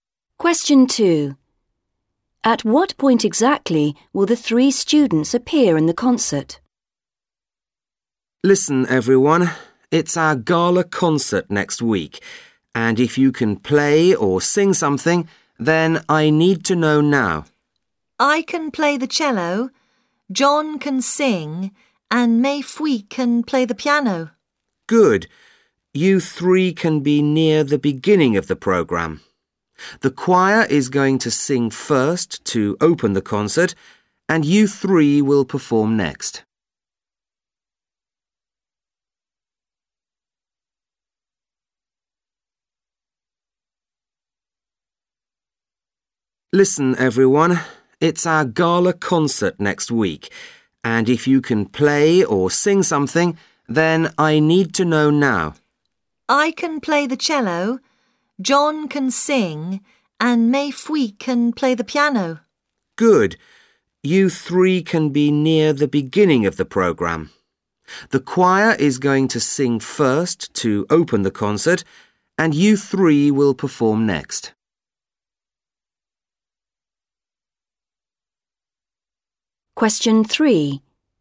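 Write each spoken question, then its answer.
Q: At what point exactly will the three students appear in the concert?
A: Second, straight after the choir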